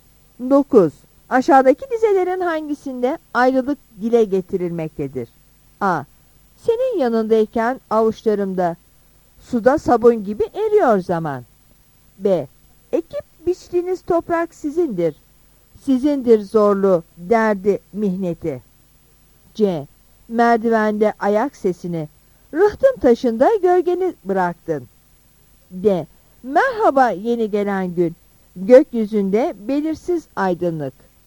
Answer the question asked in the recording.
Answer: Yanıt C'dir.